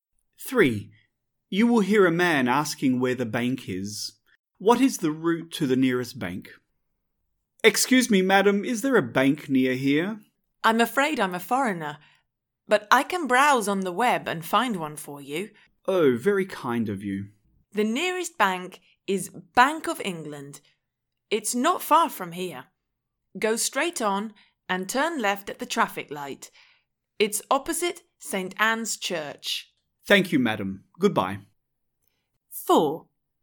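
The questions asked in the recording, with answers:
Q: What is the route to the nearest bank?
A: Go straight on and turn left at the traffic light; it's opposite St. Anne's Church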